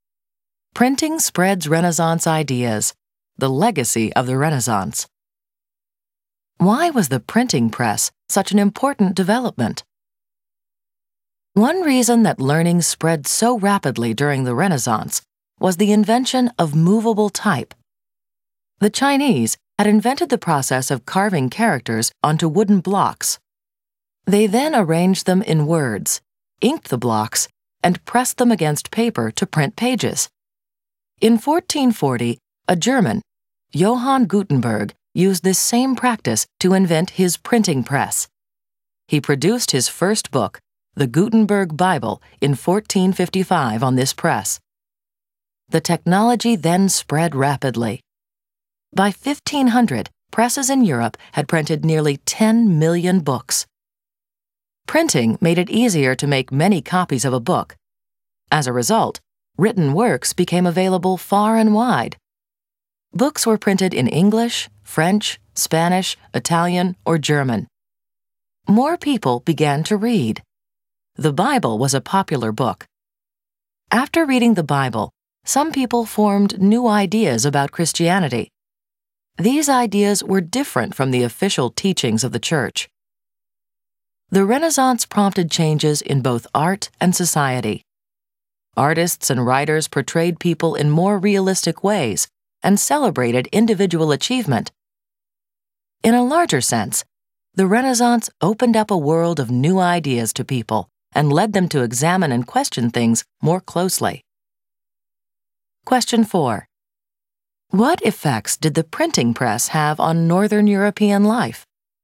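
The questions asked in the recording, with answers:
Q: What effects did the printing press have on Northern European life?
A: Books became widely available, more people read, and new ideas about Christianity spread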